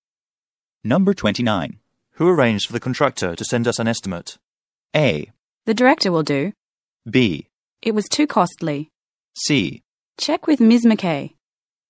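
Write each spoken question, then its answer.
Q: Who arranged for the contractor to send us an estimate?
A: C: Check with Ms. McKay.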